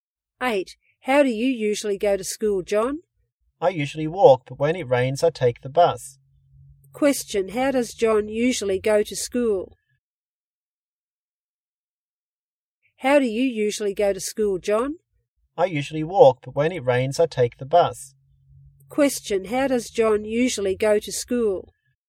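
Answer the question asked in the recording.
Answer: He walks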